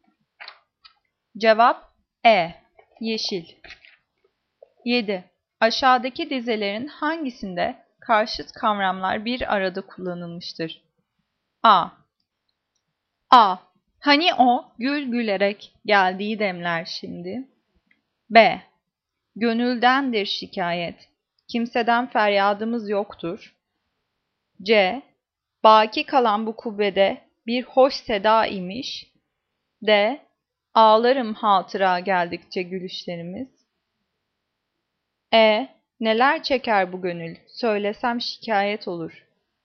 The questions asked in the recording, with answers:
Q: Aşağıdaki dizelerin hangisinde karşıt kavramlar bir arada kullanılmıştır?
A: Cevap D. Ağlarım hatıra geldikçe gülüşlerimiz.